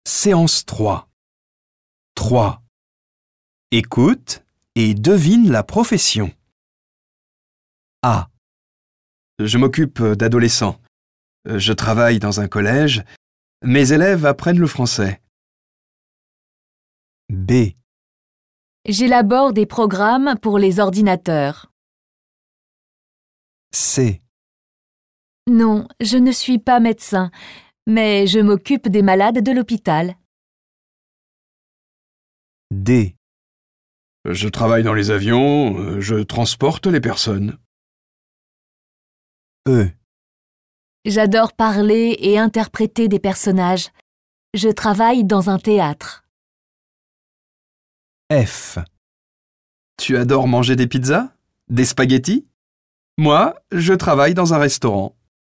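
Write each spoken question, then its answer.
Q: Écoute et devine la profession.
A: professeur de français

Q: Écoute et devine la profession.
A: informaticien (programmeur)

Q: Écoute et devine la profession.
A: infirmier / infirmière

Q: Écoute et devine la profession.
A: acteur / comédien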